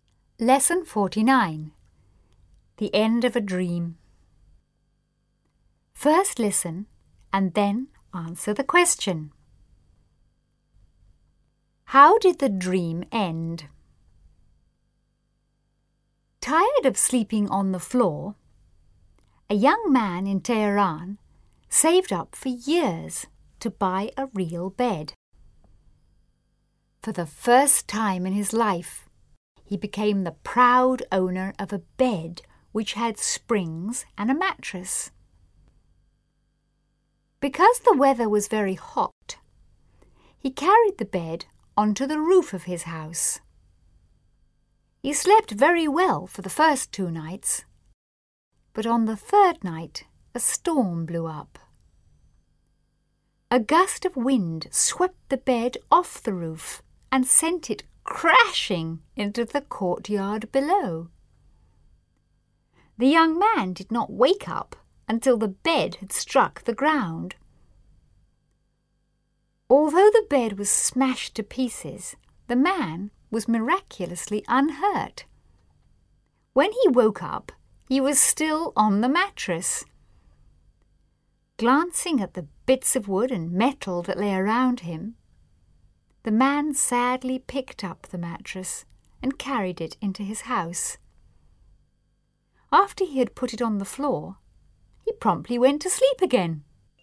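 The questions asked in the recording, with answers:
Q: How did the dream end?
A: The bed was blown off the roof and smashed, so he went back to sleeping on the mattress on the floor.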